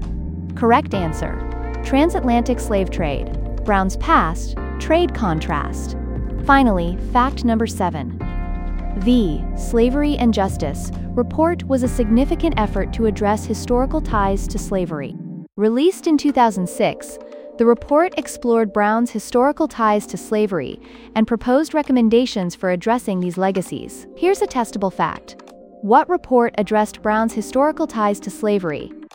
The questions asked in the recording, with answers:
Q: What report addressed Brown's historical ties to slavery?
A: Correct answer, Slavery and Justice Report.